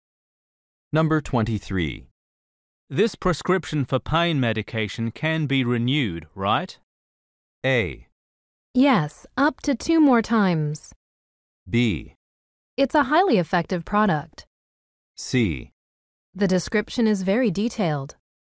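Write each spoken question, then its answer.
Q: This prescription for pain medication can be renewed, right?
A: A: Yes, up to 2 more times.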